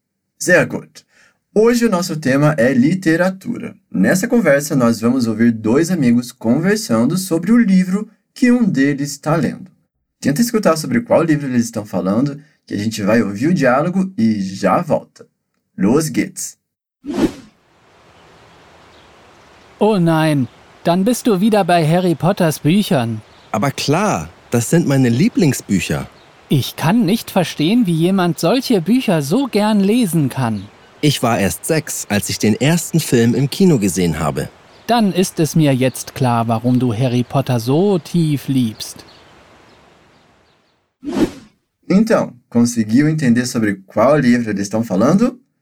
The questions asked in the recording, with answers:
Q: Então, conseguiu entender sobre qual livro eles estão falando?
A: É sobre Harry Potter.